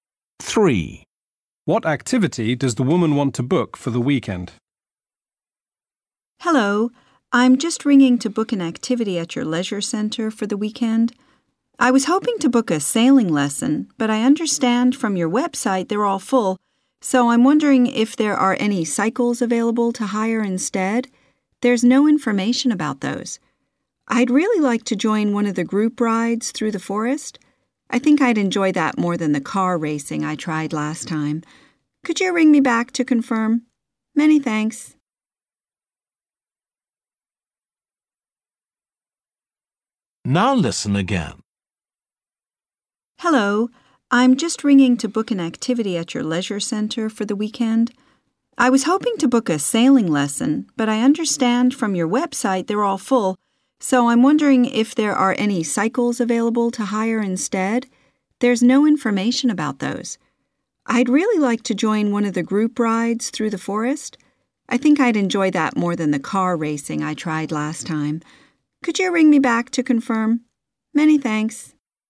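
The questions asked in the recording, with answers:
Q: What activity does the woman want to book for the weekend?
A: a cycle ride (group ride through the forest)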